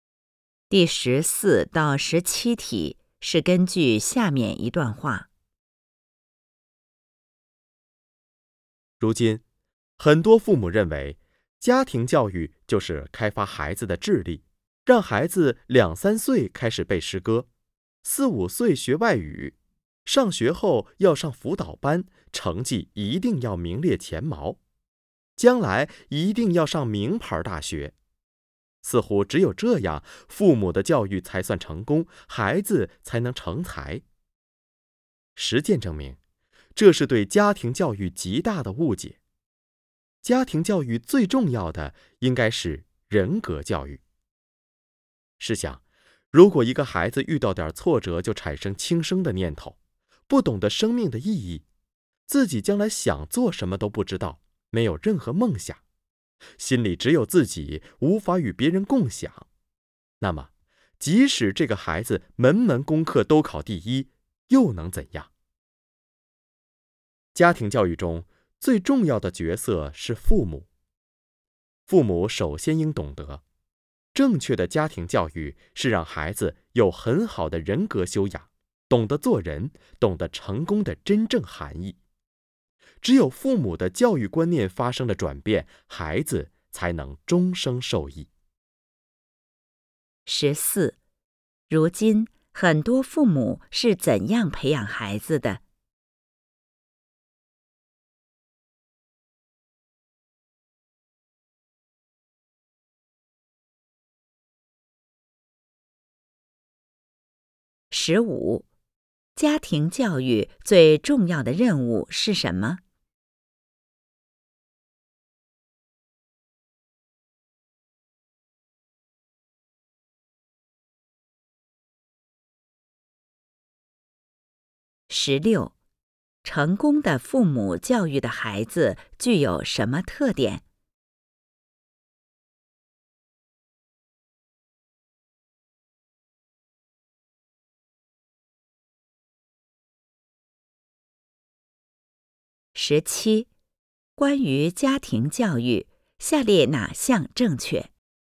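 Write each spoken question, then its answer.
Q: 如今很多父母是怎样培养孩子的?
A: 注重开发孩子的智力

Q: 家庭教育最重要的任务是什么?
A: 人格教育

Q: 成功的父母教育的孩子具有什么特点?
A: 有很好的人格修养,懂得做人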